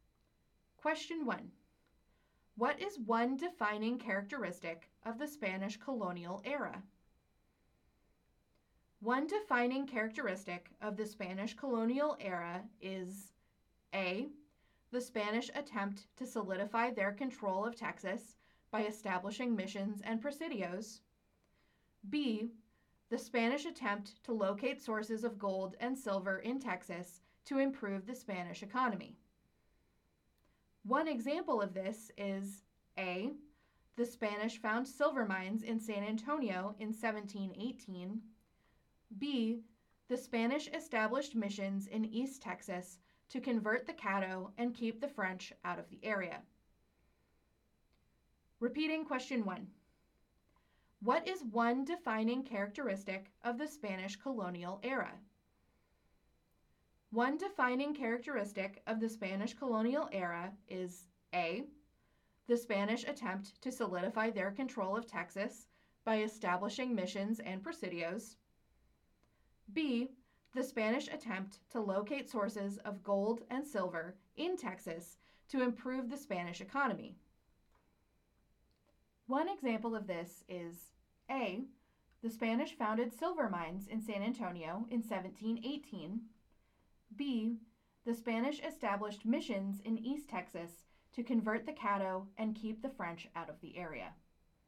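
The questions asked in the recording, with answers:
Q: One defining characteristic of the Spanish colonial era is A. The Spanish attempt to solidify their control of Texas by establishing missions and presidios. B. The Spanish attempt to locate sources of gold and silver in Texas to improve the Spanish economy.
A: A: The Spanish attempt to solidify their control of Texas by establishing missions and presidios.

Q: One example of this is A. The Spanish found silver mines in San Antonio in 1718. B. The Spanish established missions in East Texas to convert the Caddo and keep the French out of the area.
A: B: The Spanish established missions in East Texas to convert the Caddo and keep the French out of the area.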